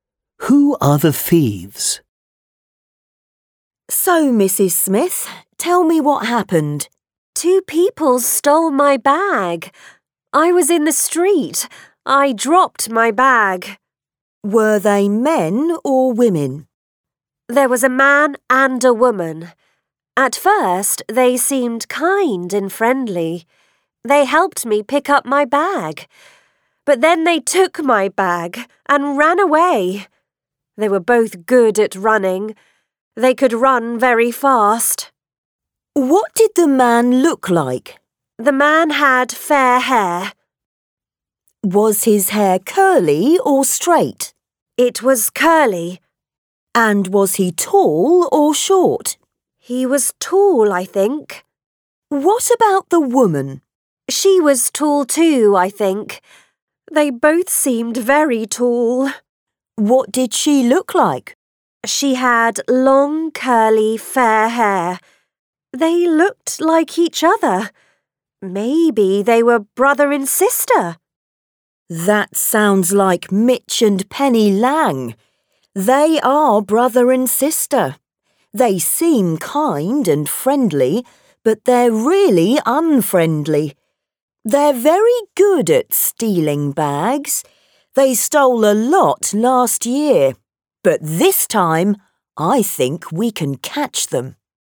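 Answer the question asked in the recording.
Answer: Mitch and Penny Lang (a brother and sister)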